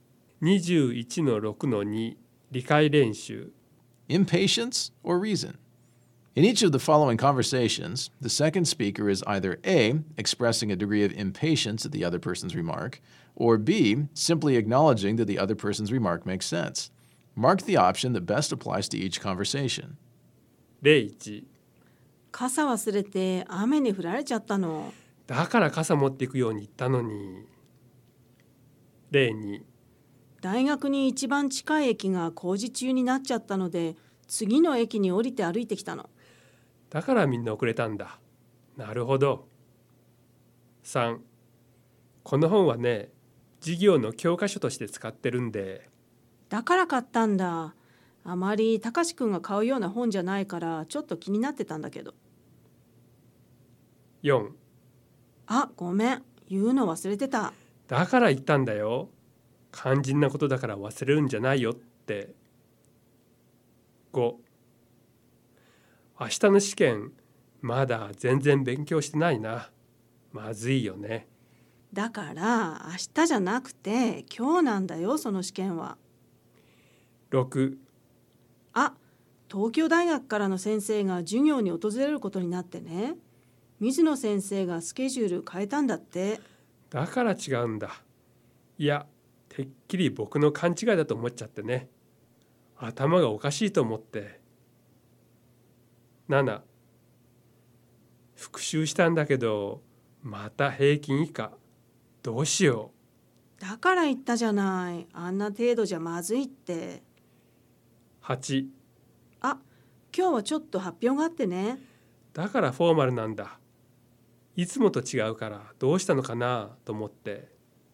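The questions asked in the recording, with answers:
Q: 大学に一番近い駅が工事中になっちゃったので、次の駅に降りて歩いてきたの。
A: B: simply acknowledging that the other person's remark makes sense

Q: この本はね、授業の教科書として使ってるんで。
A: B: simply acknowledging that the other person's remark makes sense

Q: あ、ごめん。言うの忘れてた。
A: A: expressing a degree of impatience at the other person's remark

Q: 明日の試験、まだ全然勉強してないな。まずいよね。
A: A: expressing a degree of impatience at the other person's remark

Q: あ、東京大学からの先生が授業に訪れることになってね。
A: B: simply acknowledging that the other person's remark makes sense

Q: 復習したんだけど、また平均以下、どうしよう。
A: A: expressing a degree of impatience at the other person's remark

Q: あ、今日はちょっと発表があってね。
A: B: simply acknowledging that the other person's remark makes sense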